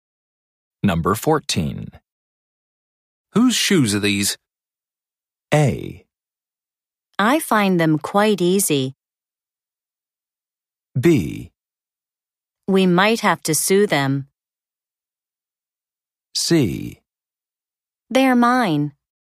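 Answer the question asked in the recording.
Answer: C: They're mine.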